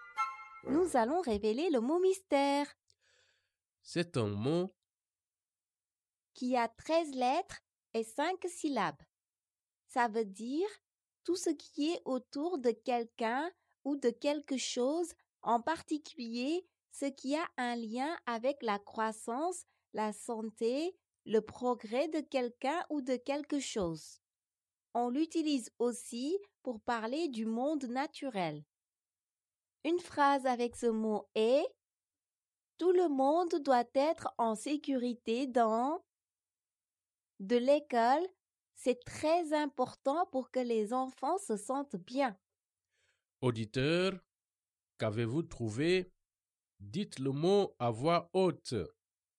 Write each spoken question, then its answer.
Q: Auditeur, qu'avez-vous trouvé Dites le mot à voix haute.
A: Le mot mystère est environnement.